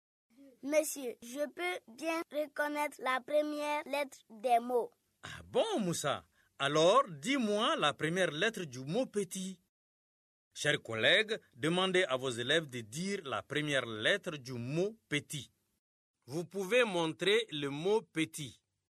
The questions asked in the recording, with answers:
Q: Alors, dis-moi la première lettre du mot petit.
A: Petit. C'est P, monsieur.